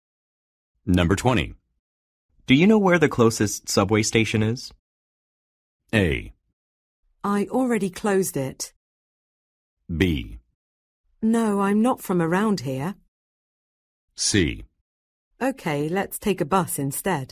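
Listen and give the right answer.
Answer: B: No, I'm not from around here.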